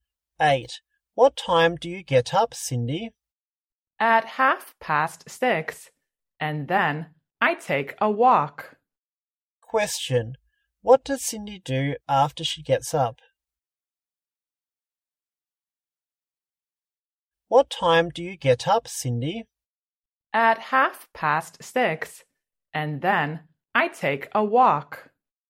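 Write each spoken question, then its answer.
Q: What does Cindy do after she gets up?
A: She takes a walk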